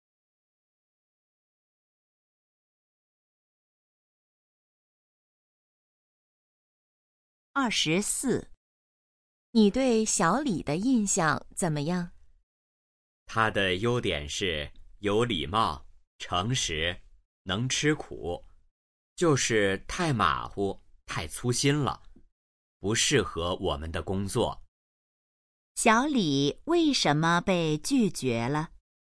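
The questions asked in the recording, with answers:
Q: 小李为什么被拒绝了?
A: 太马虎、太粗心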